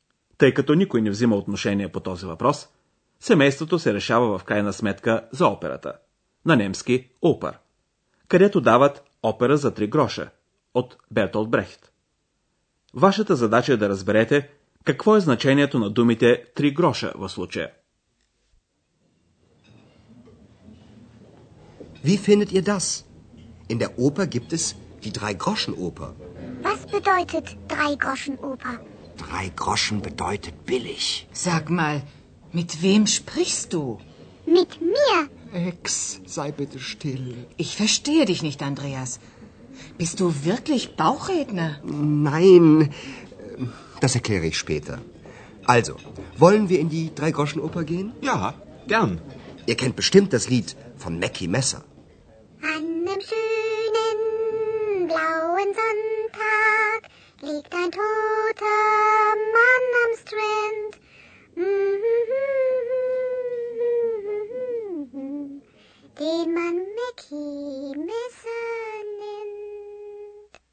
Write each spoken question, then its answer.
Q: Какво е значението на думите три гроша в случая?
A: Естествено, вие разбрахте, че три гроша означава всъщност ефтино.